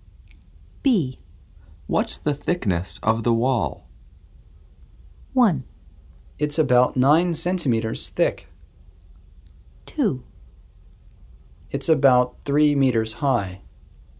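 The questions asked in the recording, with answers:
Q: What's the thickness of the wall?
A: 1: It's about 9 centimeters thick.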